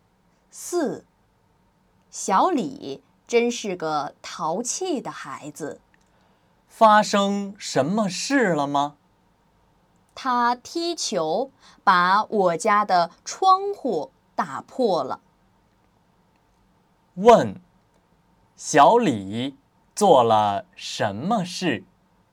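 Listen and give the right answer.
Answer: 踢球把窗户打破了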